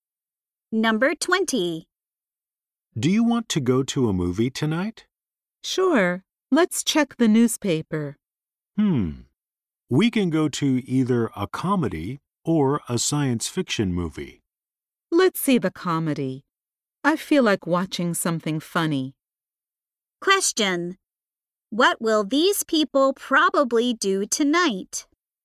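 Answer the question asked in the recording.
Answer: See a comedy movie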